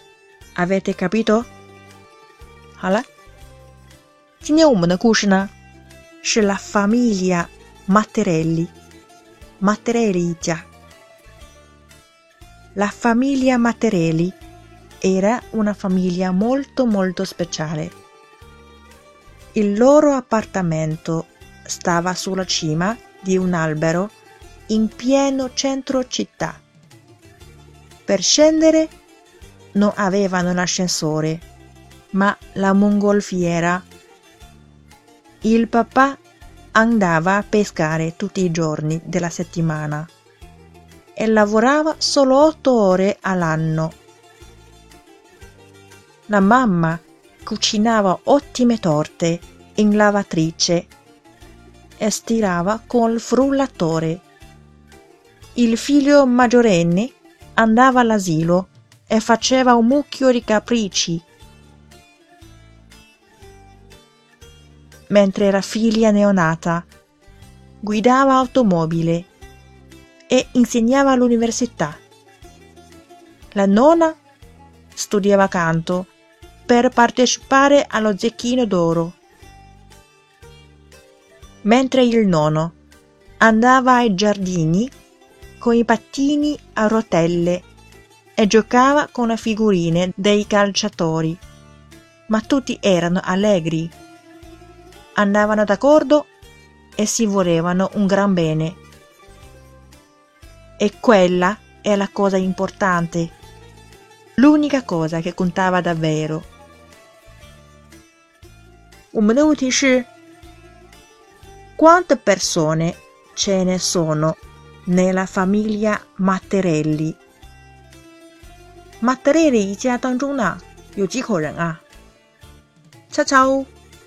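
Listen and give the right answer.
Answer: sei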